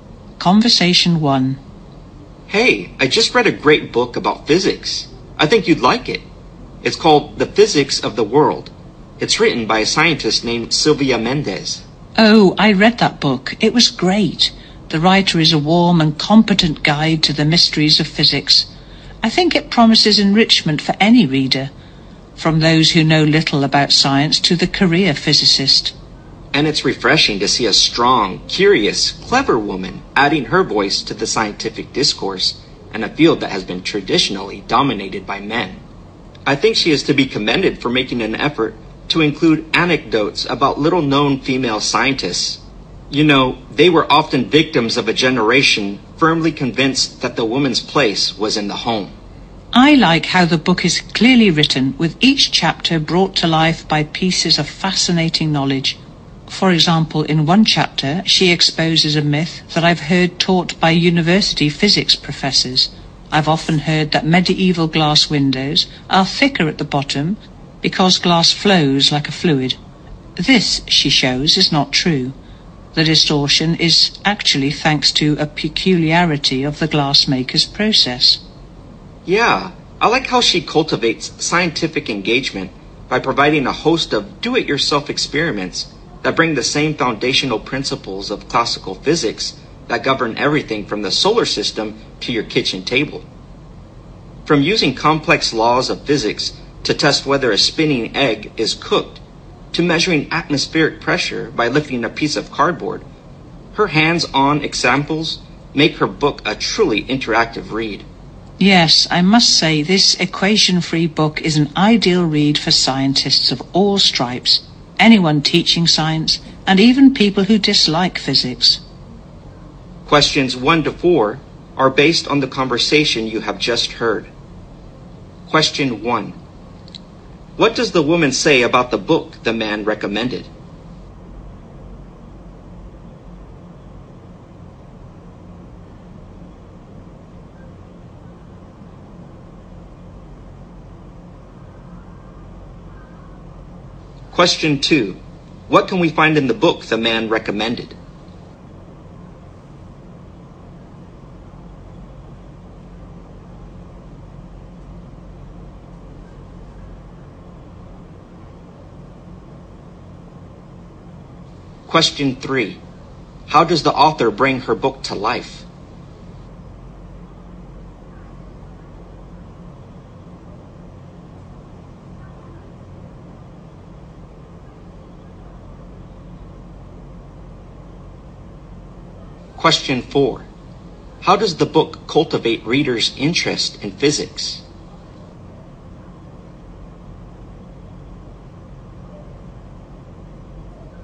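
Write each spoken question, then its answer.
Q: How does the author bring her book to life?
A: With pieces of fascinating knowledge in each chapter

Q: How does the book cultivate readers' interest in physics?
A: By providing do-it-yourself experiments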